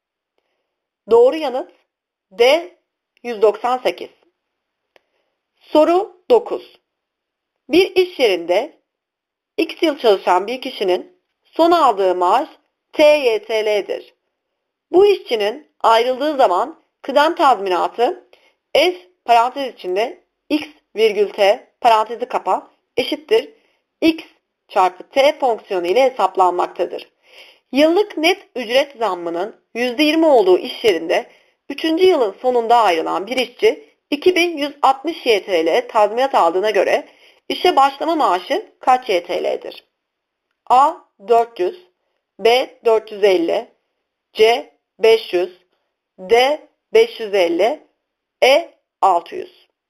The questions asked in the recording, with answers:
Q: yılın sonunda ayrılan bir işçi 2160 YTL tazminat aldığına göre işe başlama maaşı kaç YTL'dir?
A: Doğru yanıt C 500.